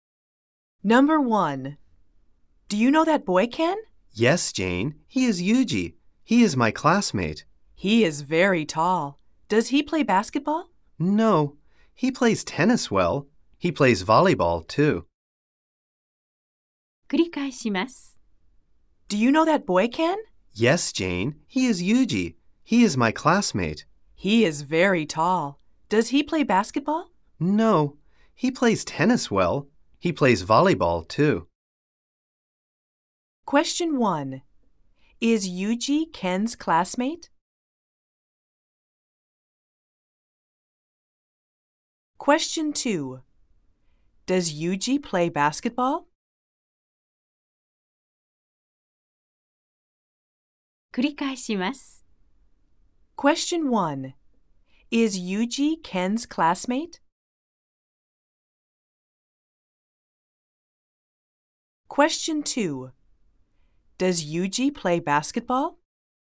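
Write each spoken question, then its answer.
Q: Is Yuji Ken's classmate?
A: Yes, he is.

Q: Does Yuji play basketball?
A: No, he doesn't.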